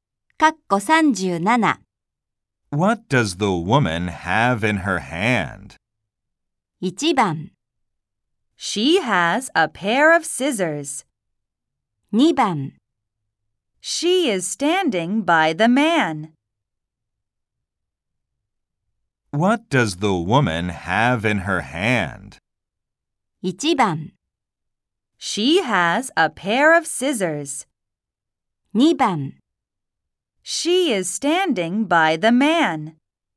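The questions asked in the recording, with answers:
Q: What does the woman have in her hand?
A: 1: She has a pair of scissors.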